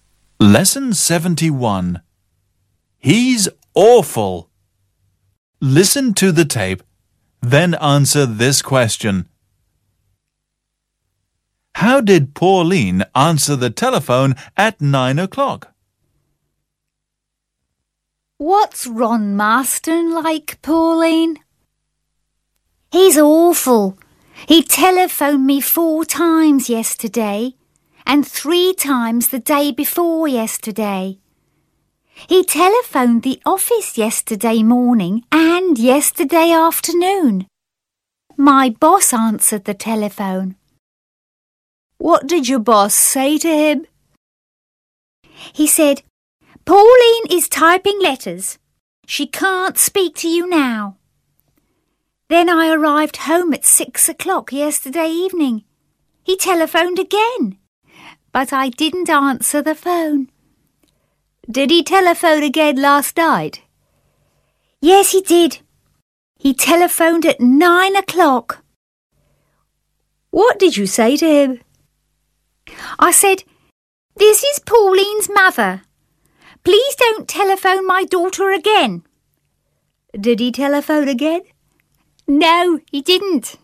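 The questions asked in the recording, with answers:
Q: How did Pauline answer the telephone at 9 o'clock?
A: She said, "This is Pauline's mother. Please don't telephone my daughter again."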